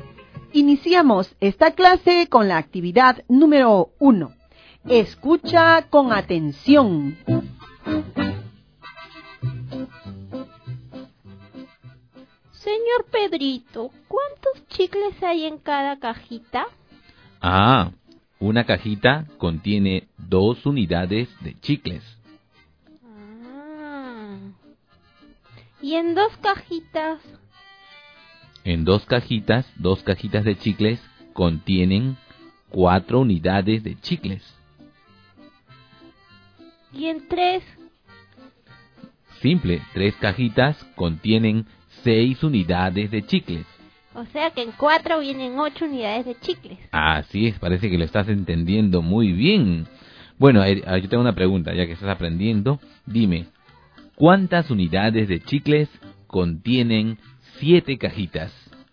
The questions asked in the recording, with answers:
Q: Dime, ¿cuántas unidades de chicles contienen 7 cajitas?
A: Y 7 por 2 es 14.